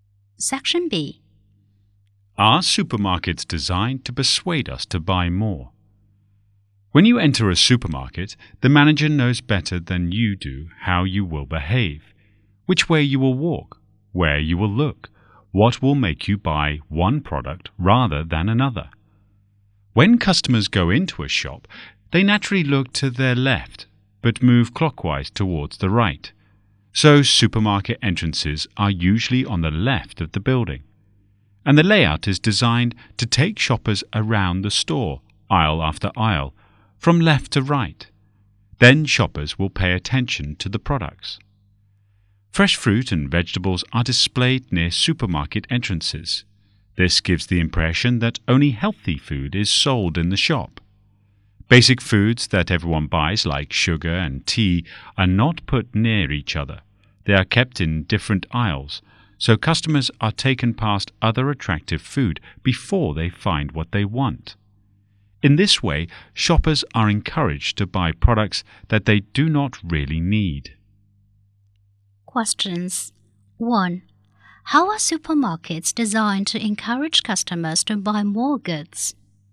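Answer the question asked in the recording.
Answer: Entrances are on the left, and the layout takes shoppers through aisle after aisle; fresh produce is near the entrance; basic foods are kept in different aisles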